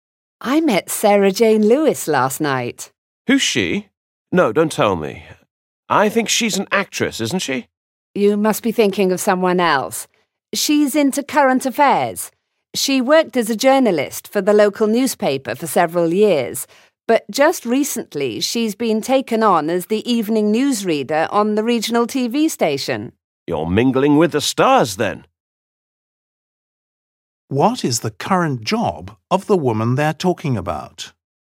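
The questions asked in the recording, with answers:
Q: What is the current job of the woman they're talking about?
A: evening newsreader on regional TV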